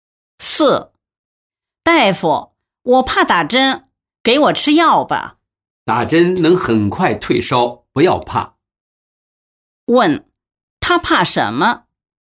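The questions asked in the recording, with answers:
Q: 他怕什么?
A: 打针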